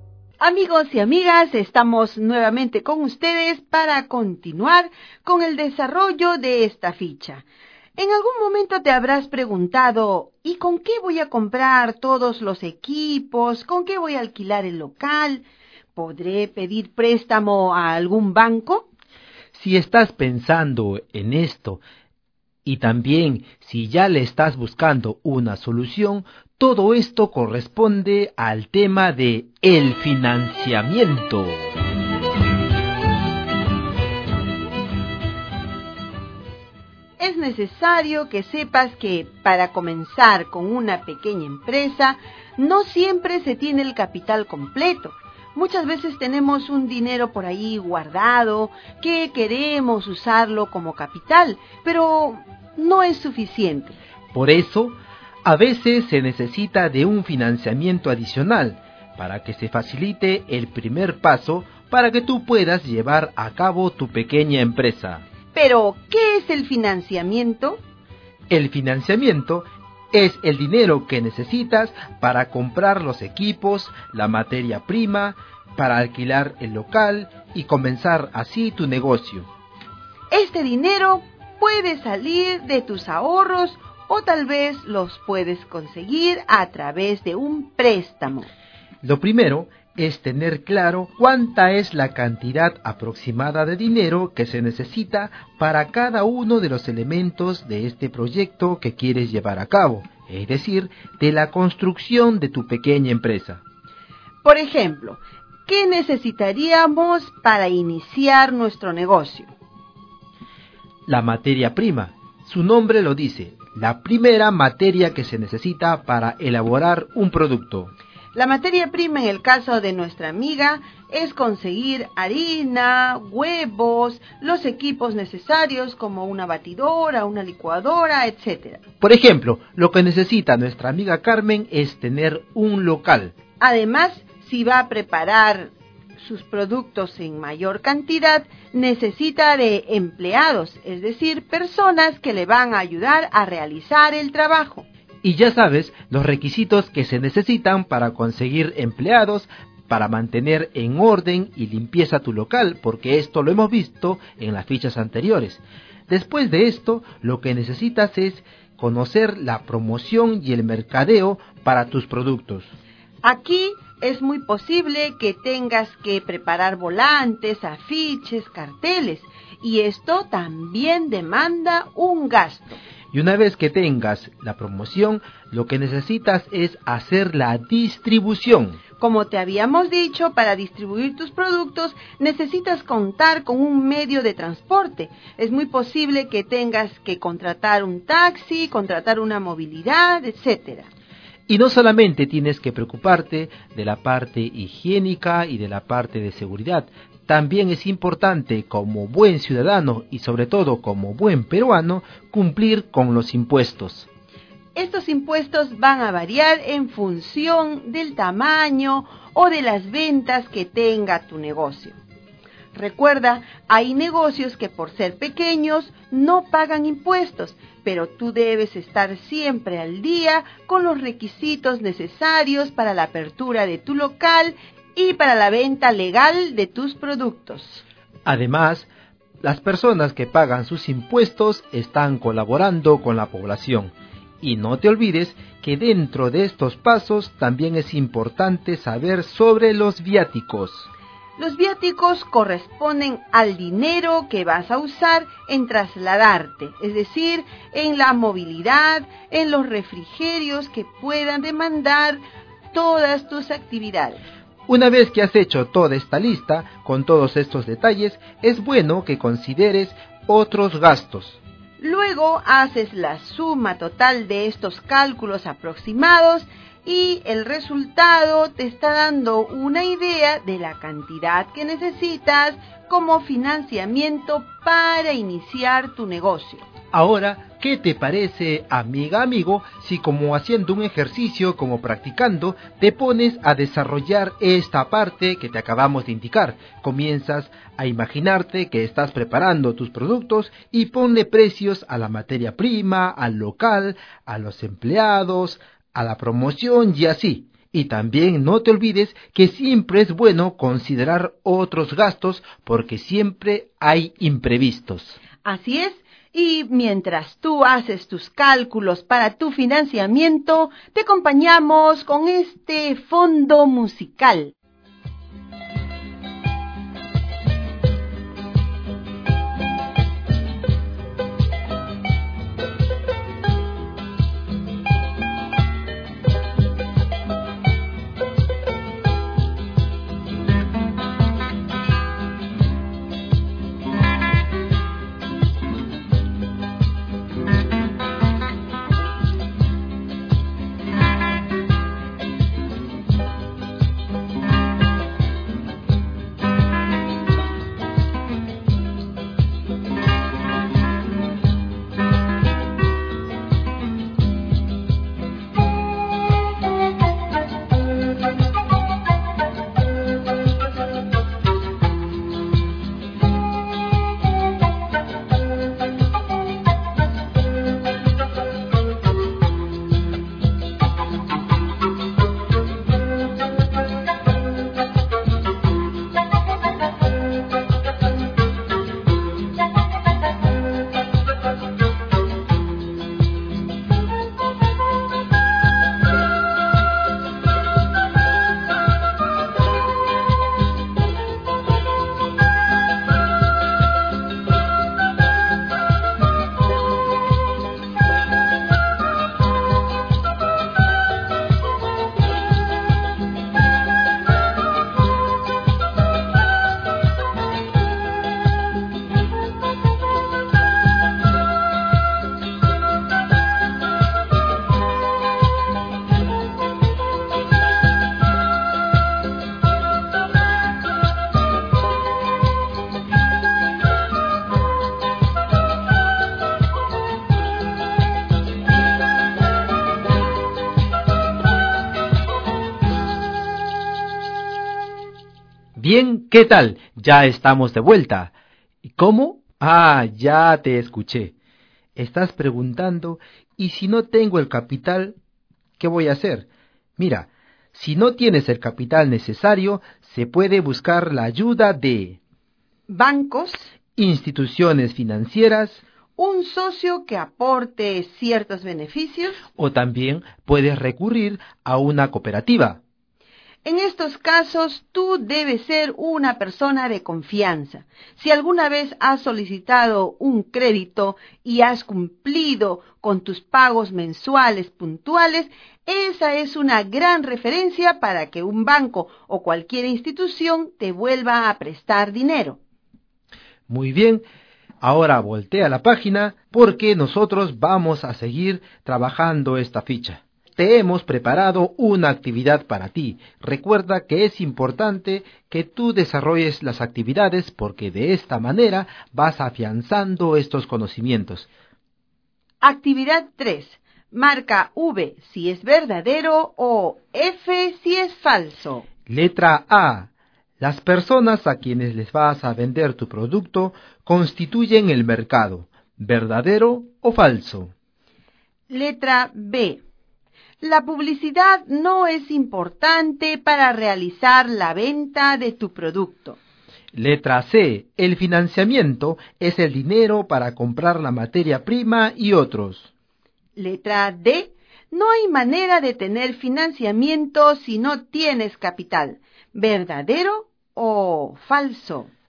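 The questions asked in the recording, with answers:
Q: Letra B. La publicidad no es importante para realizar la venta de tu producto.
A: Falso

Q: Letra C. El financiamiento es el dinero para comprar la materia prima y otros.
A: Verdadero

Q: Letra D. No hay manera de tener financiamiento si no tienes capital.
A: Falso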